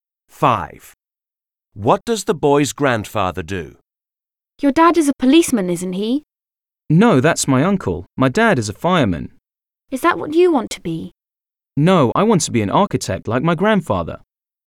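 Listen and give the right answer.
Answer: He's an architect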